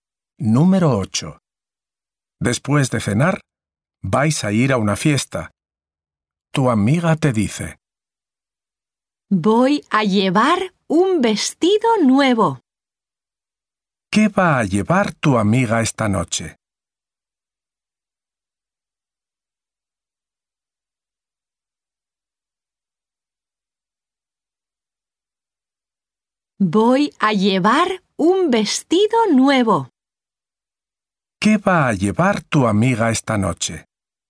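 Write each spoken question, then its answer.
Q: ¿Qué va a llevar tu amiga esta noche?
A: Un vestido nuevo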